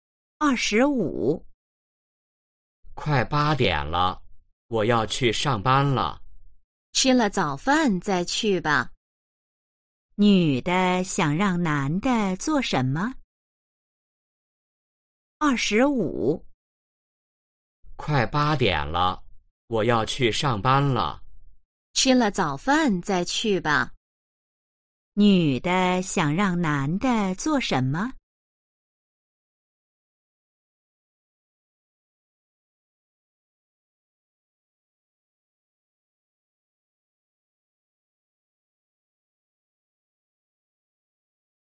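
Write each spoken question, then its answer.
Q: 女的想让男的做什么?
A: 吃早饭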